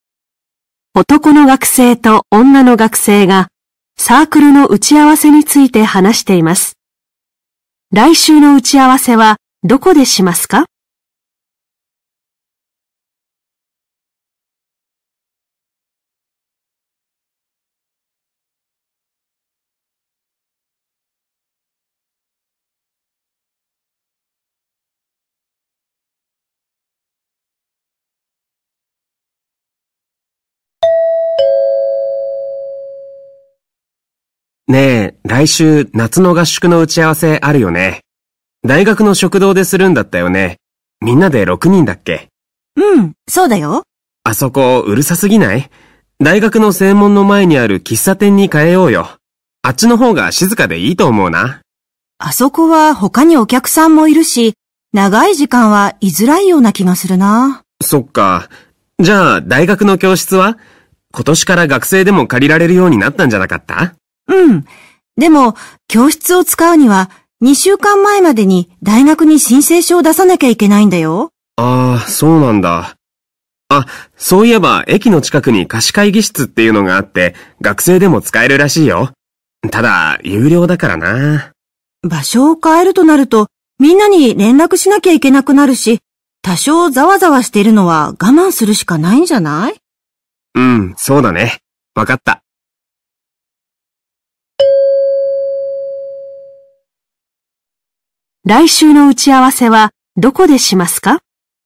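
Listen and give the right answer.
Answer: 大学の食堂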